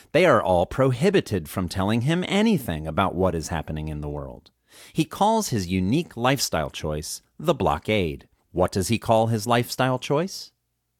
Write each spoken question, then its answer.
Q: What does he call his lifestyle choice?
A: He calls his lifestyle choice the blockade.